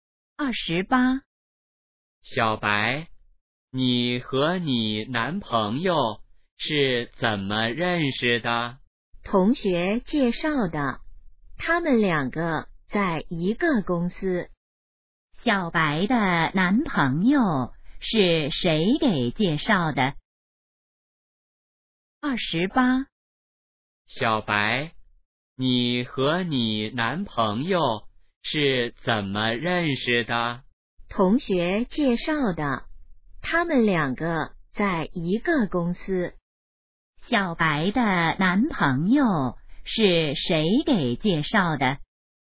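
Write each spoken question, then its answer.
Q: 小白的男朋友是谁给介绍的?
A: 同学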